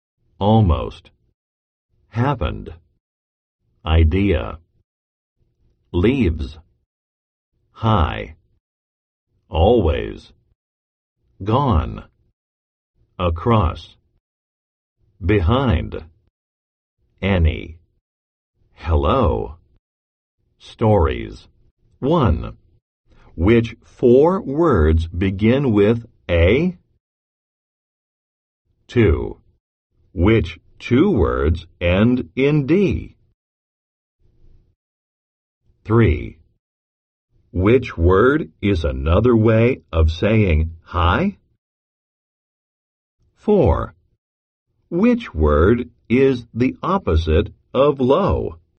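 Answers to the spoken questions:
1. almost, always, across, any
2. happened, behind
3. hello
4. high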